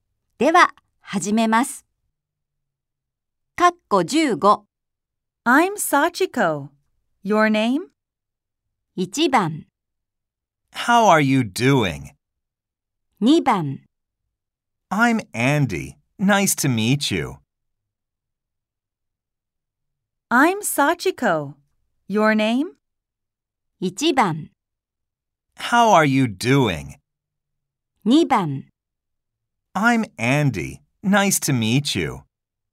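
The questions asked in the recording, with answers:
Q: I'm Sachiko. Your name?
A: 2: I'm Andy. Nice to meet you.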